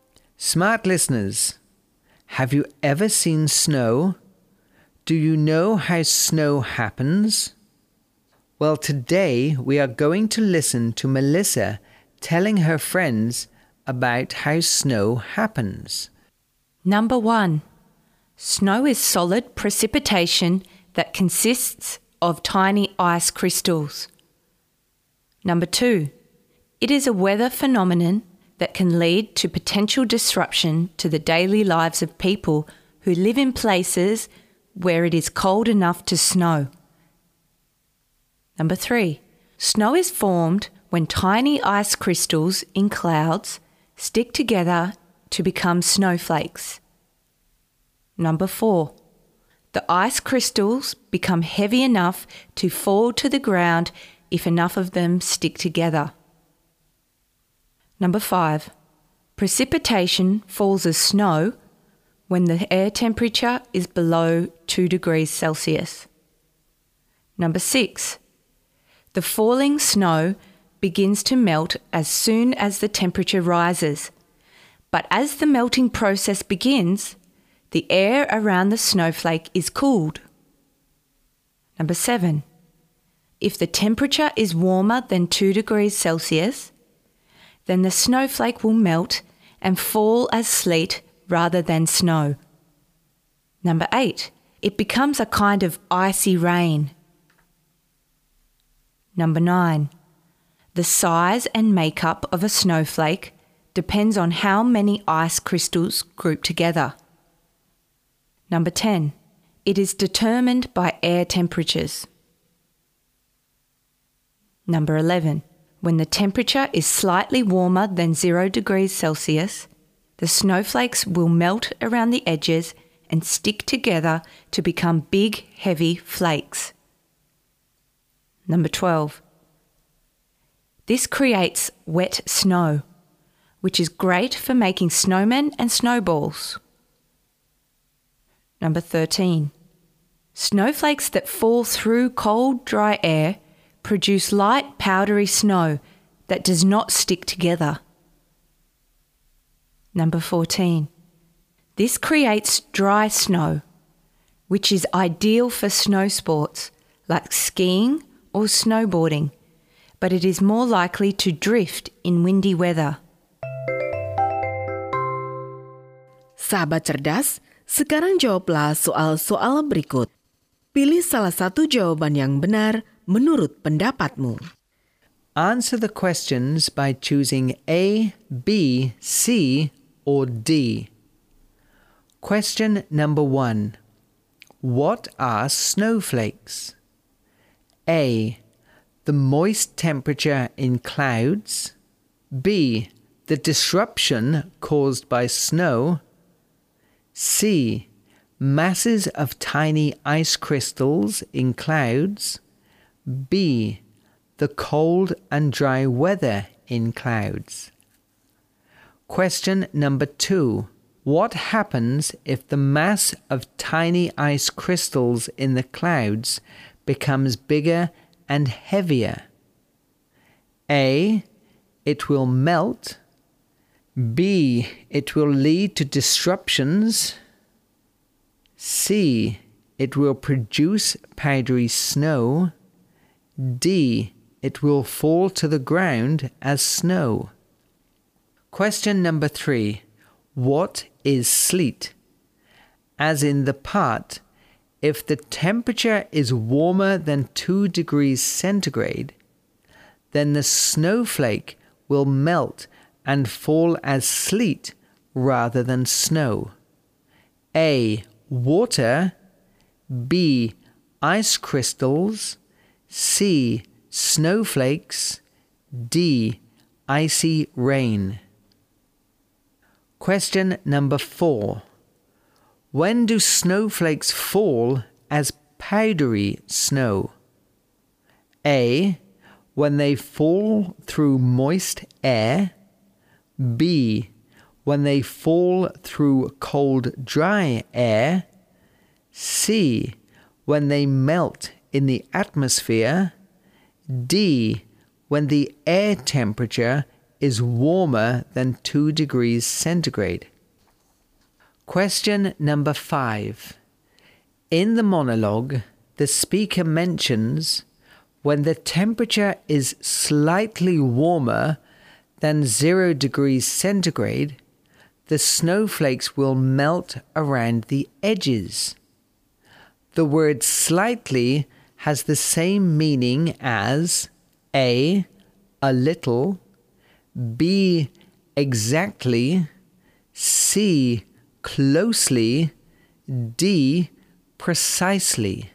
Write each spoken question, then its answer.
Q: What are snowflakes?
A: C. Masses of tiny ice crystals in the clouds.

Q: What happens if the mass of tiny ice crystals in the clouds becomes bigger and heavier?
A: D. It will fall to the ground as snow.

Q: What is sleet?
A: D. Icy rain.

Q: When do snowflakes fall as powdery snow?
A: B. When they fall through cold, dry air.

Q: The word slightly has the same meaning as A.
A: A. A little.